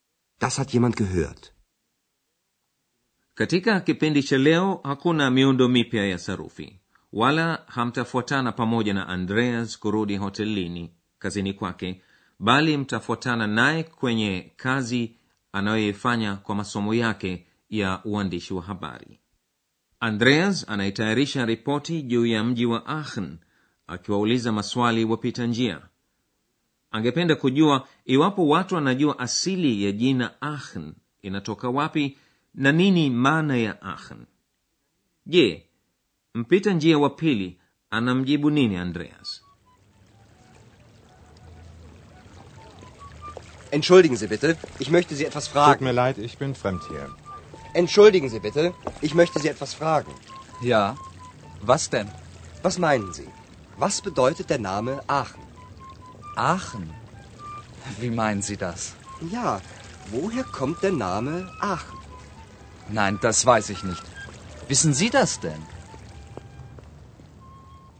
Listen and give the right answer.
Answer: Mpita njia wa pili anayeulizwa na Andreas haijui asili ya jina Aachen.